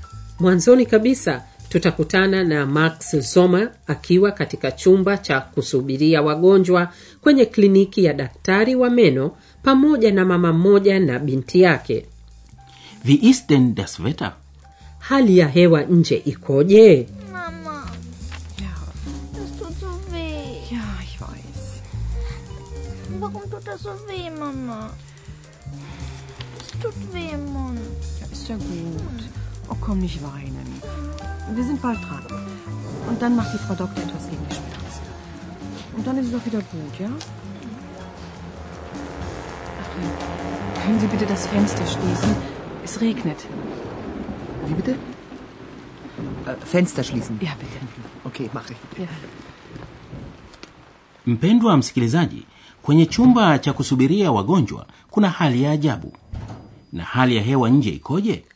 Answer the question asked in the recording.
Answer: Es regnet. Mvua inanyesha.